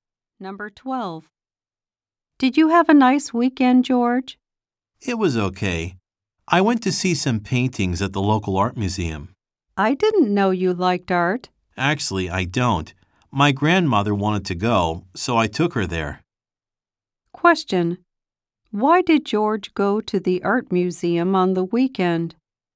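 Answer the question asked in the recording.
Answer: His grandmother wanted to go, so he took her.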